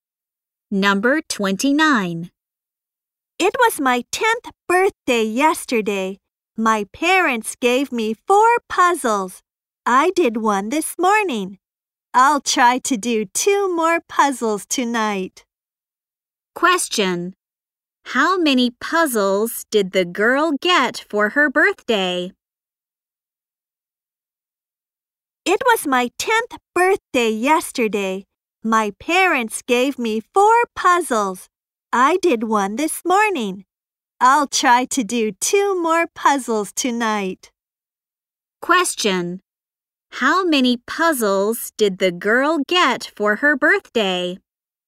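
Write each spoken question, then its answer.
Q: How many puzzles did the girl get for her birthday?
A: Four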